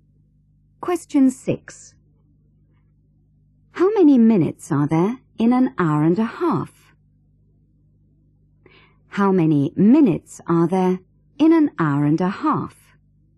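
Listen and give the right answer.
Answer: 90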